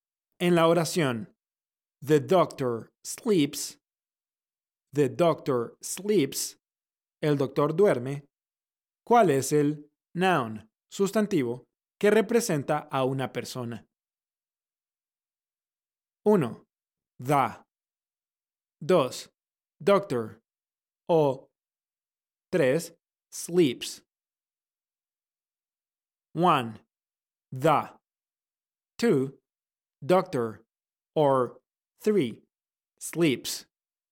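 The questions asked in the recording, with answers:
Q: ¿Cuál es el noun, sustantivo, que representa a una persona?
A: 2: Doctor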